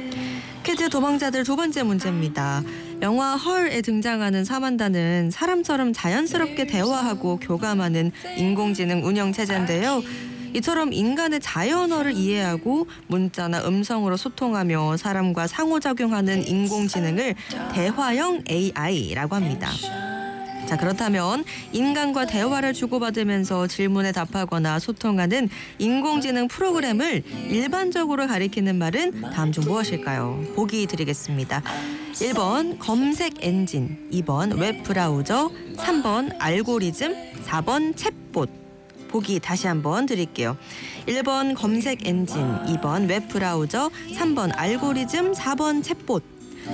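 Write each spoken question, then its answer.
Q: 자, 그렇다면 인간과 대화를 주고받으면서 질문에 답하거나 소통하는 인공지능 프로그램을 일반적으로 가리키는 말은 다음 중 무엇일까요?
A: 4번: 챗봇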